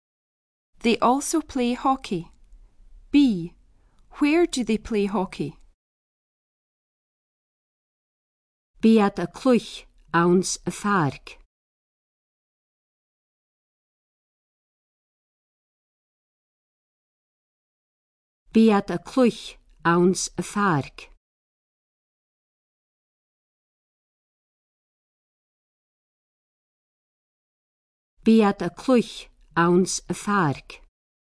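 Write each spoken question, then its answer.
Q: Where do they play hockey?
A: In the park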